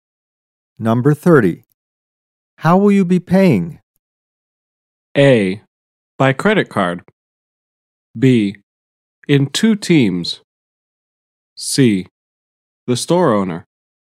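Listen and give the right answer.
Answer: A: By credit card.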